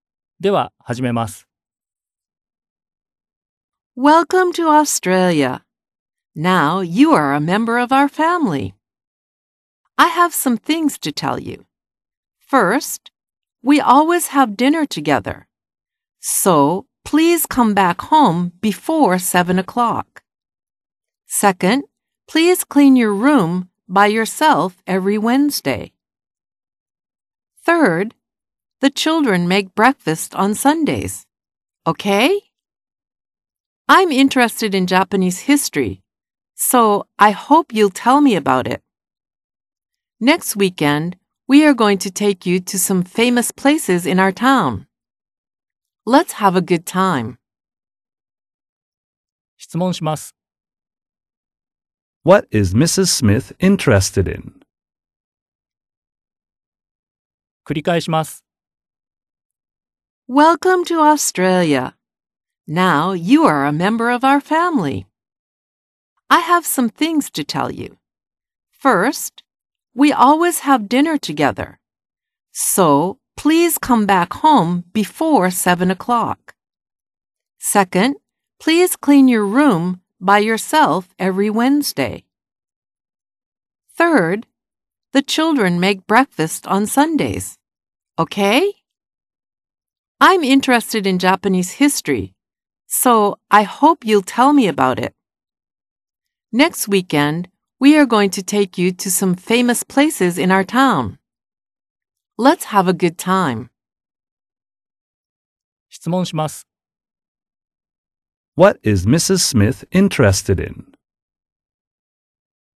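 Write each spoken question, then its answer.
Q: What is Mrs. Smith interested in?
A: Japanese history.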